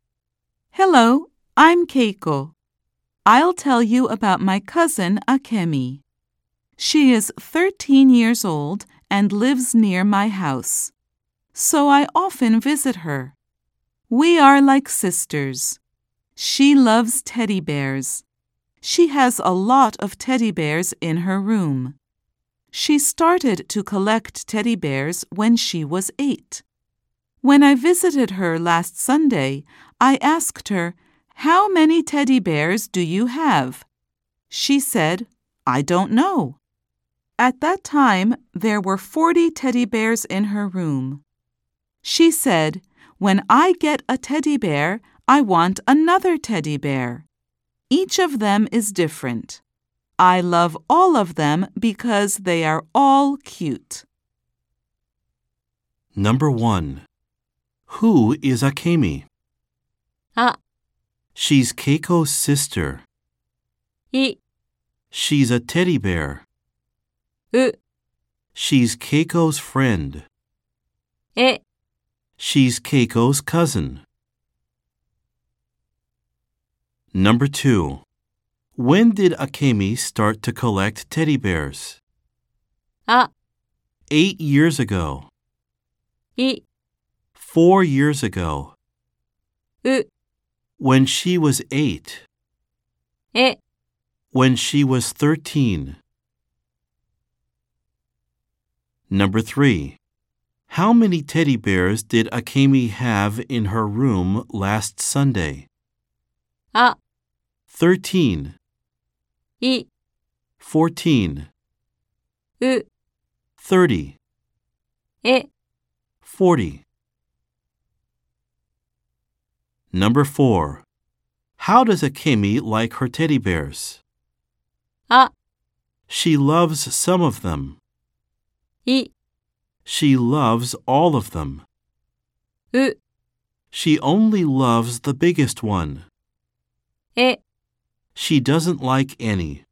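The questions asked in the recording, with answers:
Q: Who is Akemi?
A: え: She's Keiko's cousin.

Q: When did Akemi start to collect teddy bears?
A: う: When she was 8.

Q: How many teddy bears did Akemi have in her room last Sunday?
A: え: 40.

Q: How does Akemi like her teddy bears?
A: い: She loves all of them.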